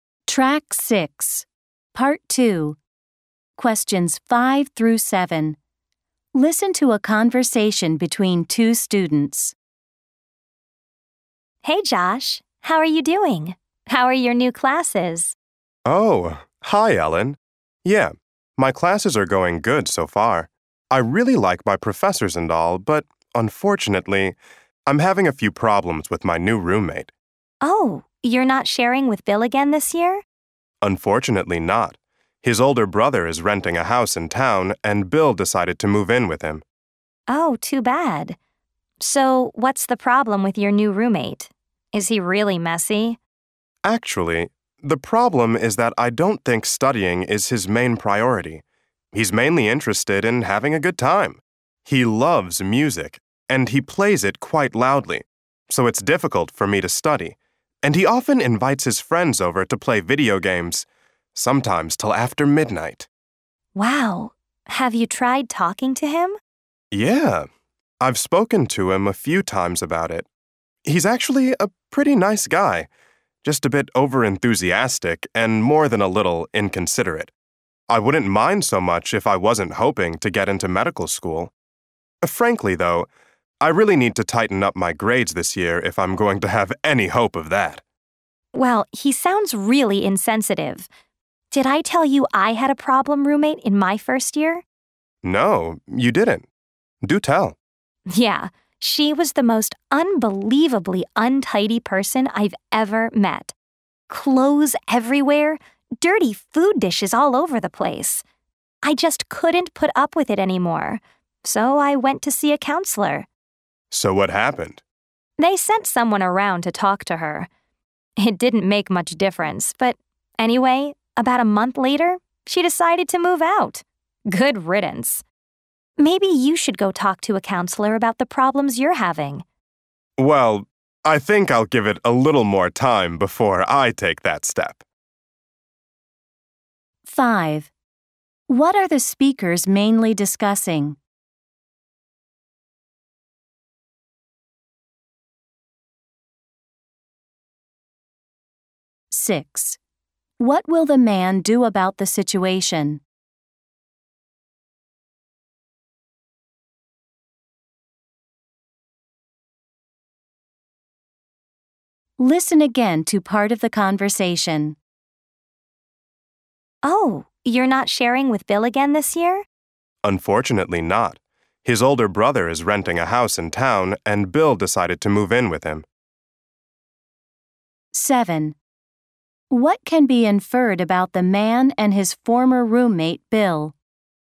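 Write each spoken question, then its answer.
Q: What are the speakers mainly discussing?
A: Problems with the man's new roommate

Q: What will the man do about the situation?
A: Wait a little longer before seeing a counselor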